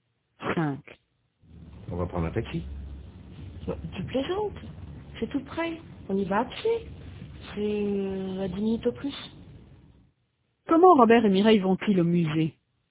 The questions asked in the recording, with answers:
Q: Comment Robert et Mireille vont-ils au musée?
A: À pied.